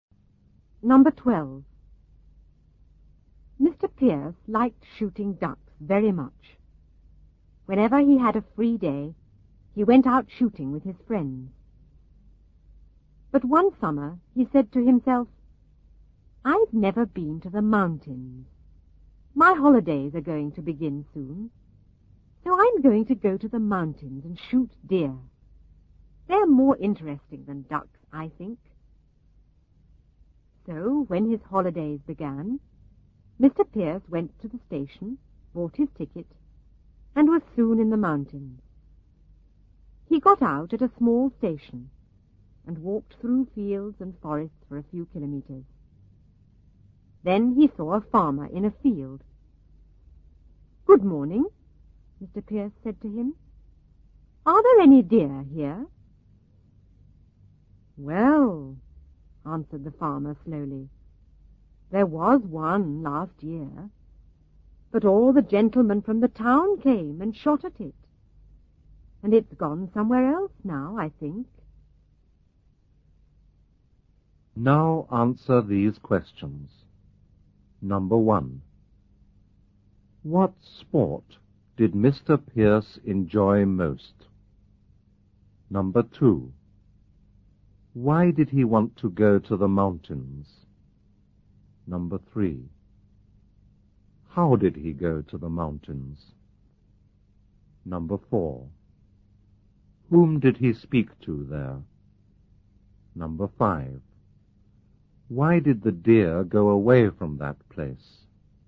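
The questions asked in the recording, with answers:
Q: What sport did Mr. Pierce enjoy most?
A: Shooting ducks

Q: Why did he want to go to the mountains?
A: He had never been there and wanted to shoot deer, which he thought more interesting than ducks

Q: How did he go to the mountains?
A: By train

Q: Whom did he speak to there?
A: A farmer

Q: Why did the deer go away from that place?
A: Because all the gentlemen from the town came and shot at it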